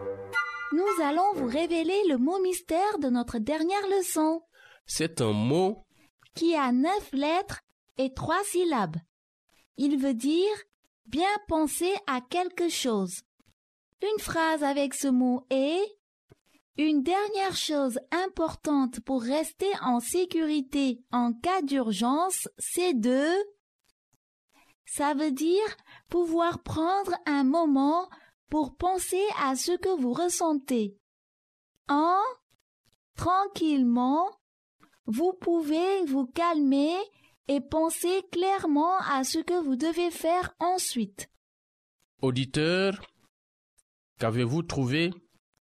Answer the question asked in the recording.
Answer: Le mot mystère d'aujourd'hui est réfléchir.